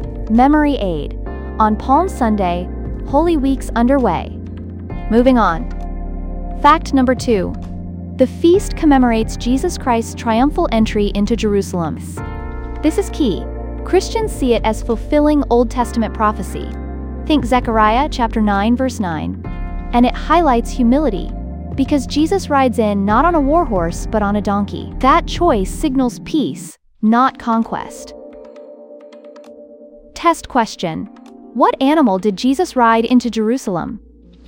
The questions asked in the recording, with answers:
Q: What animal did Jesus ride into Jerusalem?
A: A donkey.